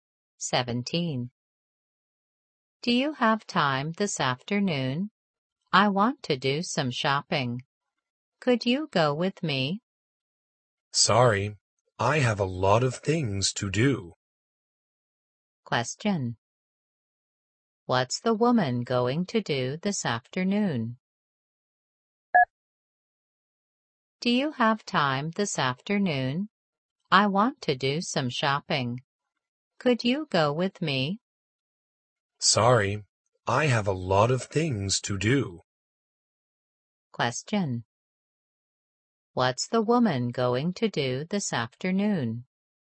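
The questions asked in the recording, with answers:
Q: What's the woman going to do this afternoon?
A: Go shopping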